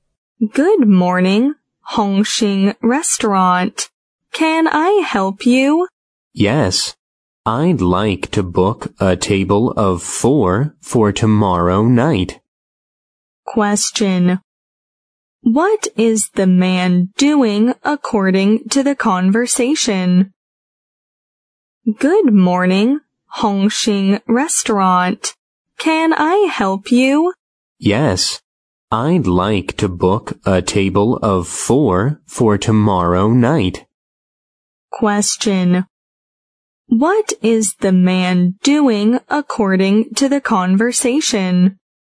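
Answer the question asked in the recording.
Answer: Booking a table for 4 for tomorrow night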